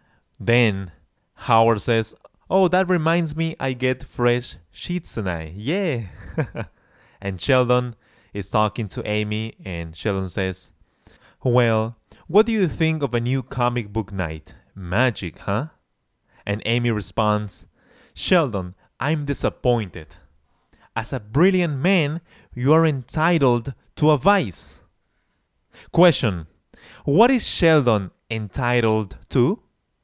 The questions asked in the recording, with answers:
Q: What is Sheldon entitled to?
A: Amy suggests that Sheldon is entitled to a vice.